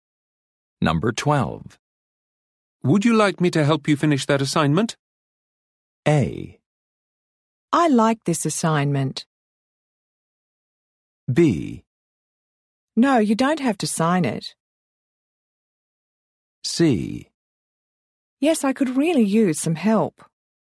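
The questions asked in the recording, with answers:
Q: Would you like me to help you finish that assignment?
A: C: Yes, I could really use some help.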